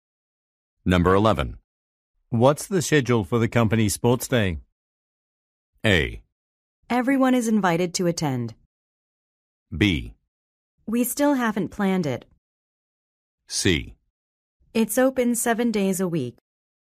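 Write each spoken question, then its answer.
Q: What's the schedule for the company sports day?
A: B: We still haven't planned it.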